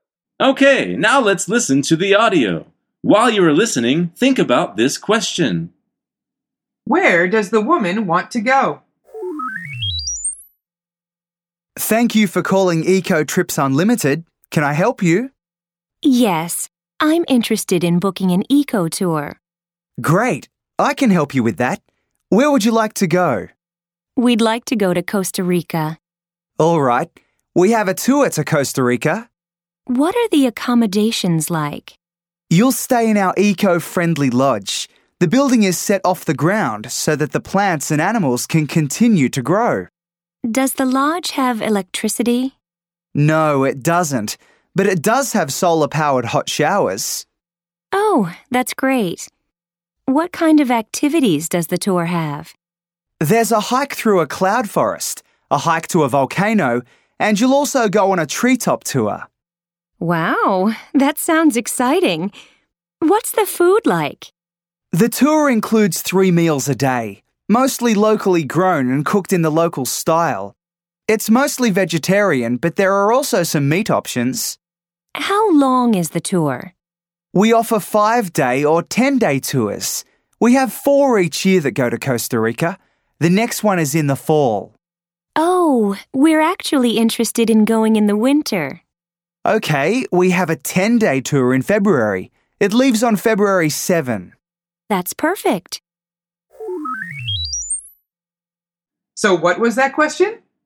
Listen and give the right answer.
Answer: The answer is Costa Rica.